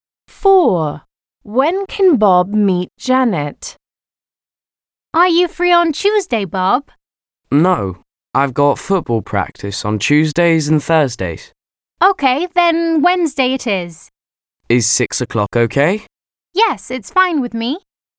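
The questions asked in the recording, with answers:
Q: When can Bob meet Janet?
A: Wednesday at 6 o'clock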